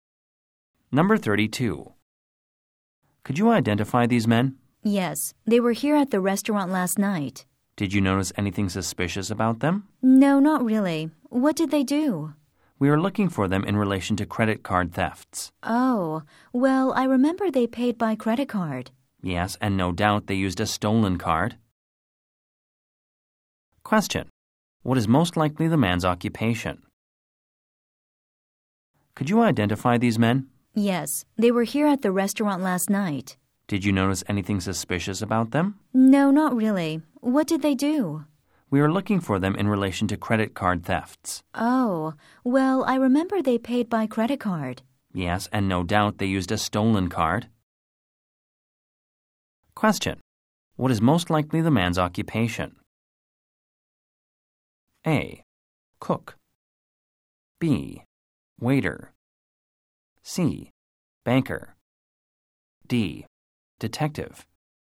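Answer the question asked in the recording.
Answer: D: Detective.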